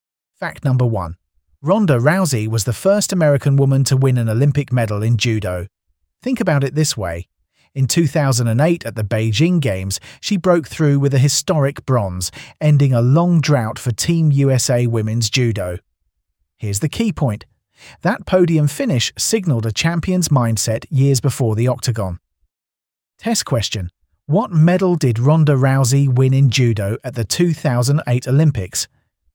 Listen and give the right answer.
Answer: Correct answer, bronze.